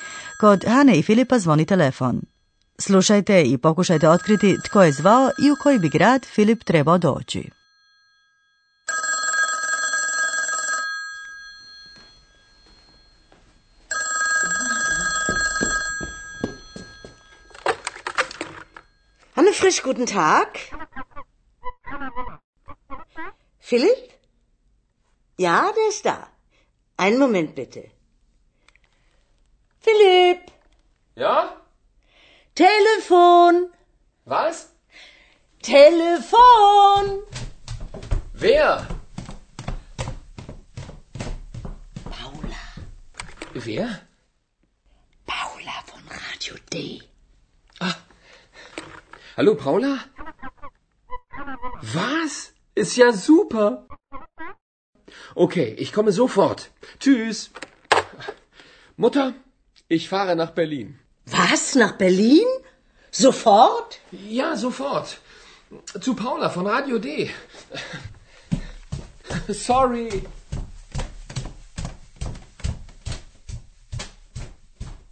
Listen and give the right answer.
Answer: nazvala je žena koja se zove Paula i koja očito radi na nekoj radijskoj postaji, radio D, i Filip bi trebao doći u Berlin.